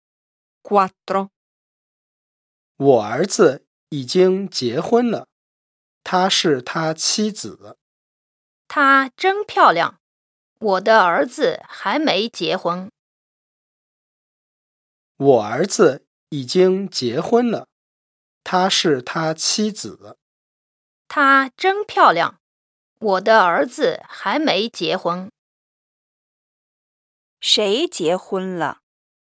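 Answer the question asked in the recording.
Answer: 第一个说话人的儿子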